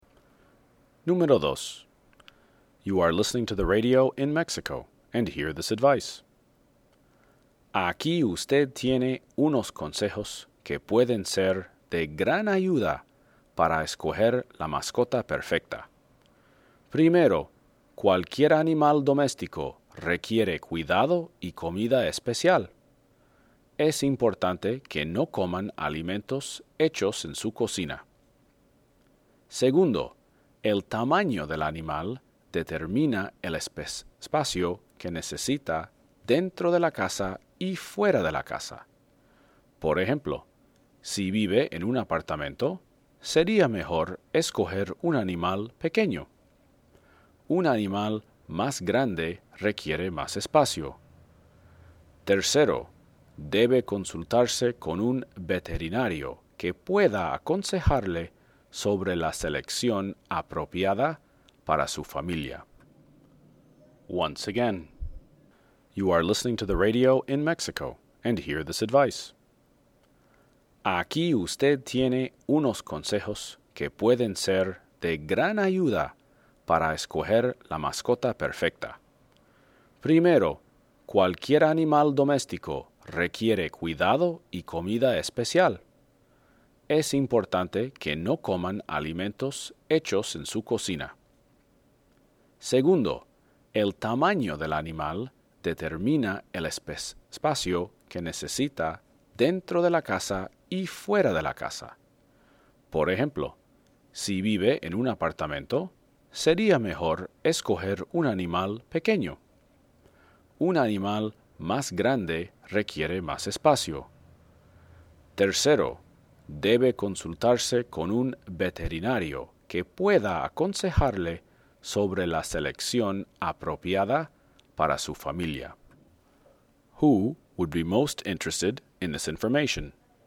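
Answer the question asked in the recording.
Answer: Someone planning to choose a pet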